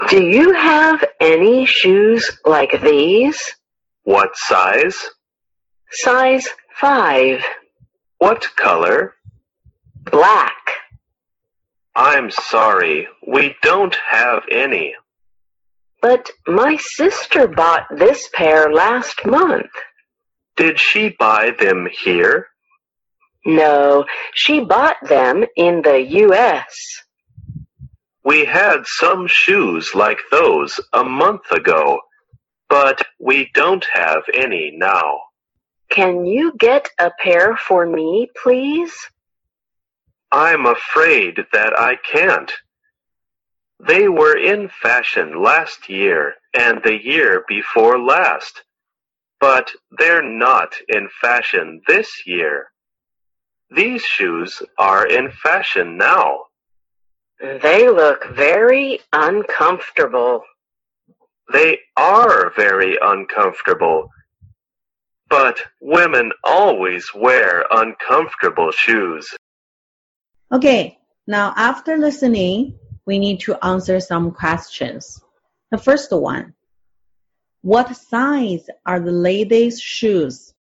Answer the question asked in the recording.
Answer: Size 5.